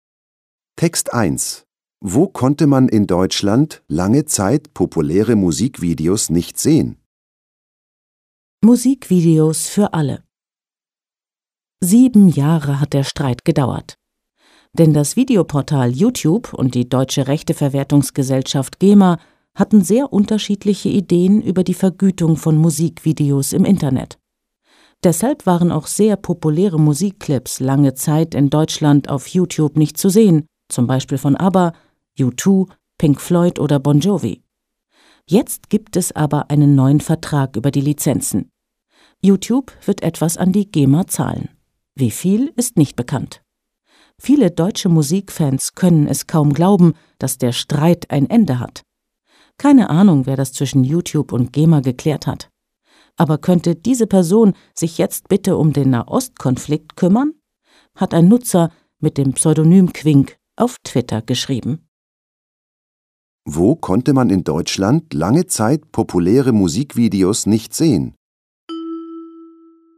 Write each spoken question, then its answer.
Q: Wo konnte man in Deutschland lange Zeit populäre Musikvideos nicht sehen?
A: Im Videoportal YouTube.